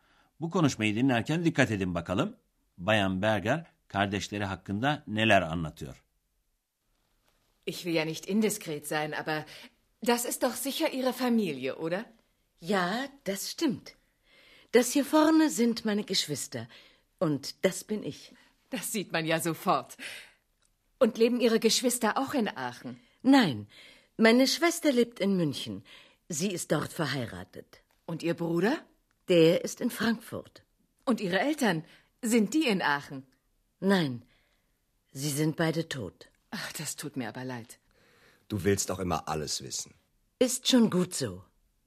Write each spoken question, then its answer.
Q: Bayan Berger kardeşleri hakkında neler anlatıyor.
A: Bayan Berger'in kız kardeşi evli ve Münih'te yaşıyor. Erkek kardeşi ise Frankfurt'ta yaşıyormuş.